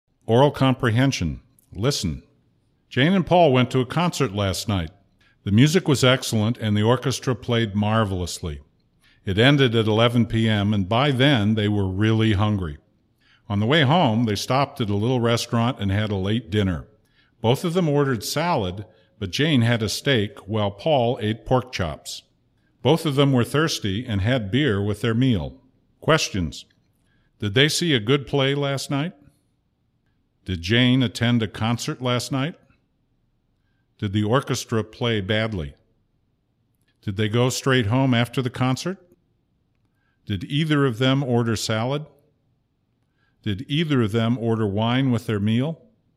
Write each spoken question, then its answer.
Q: Did they see a good play last night?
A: no, they didn't see a good play last night.

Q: Did Jane attend a concert last night?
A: Yes, Jane attended a concert last night.

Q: Did the orchestra play badly?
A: No, the orchestra didn't play badly.

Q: Did they go straight home after the concert?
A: No, they didn't go straight home after the concert.

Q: Did either of them order salad?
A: Yes, both of them ordered salad.

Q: Did either of them order wine with their meal?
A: No, neither of them ordered wine with their meal.